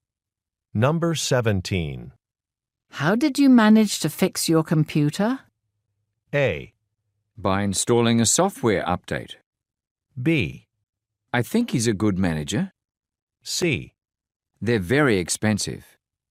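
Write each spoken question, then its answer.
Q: How did you manage to fix your computer?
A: A: By installing a software update.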